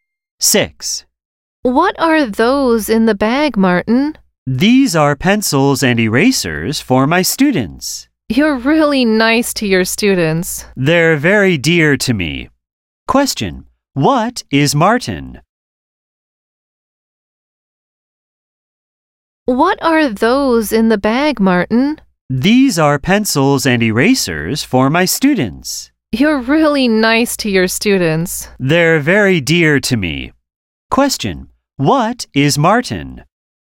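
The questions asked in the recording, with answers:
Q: What is Martin?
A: A teacher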